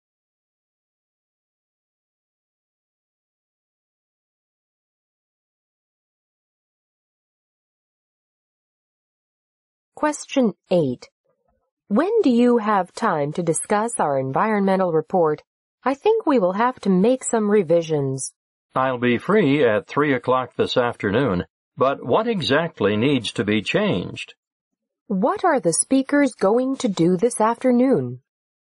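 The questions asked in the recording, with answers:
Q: What are the speakers going to do this afternoon?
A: Discuss revisions to their environmental report.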